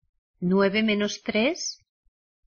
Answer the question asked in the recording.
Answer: Six.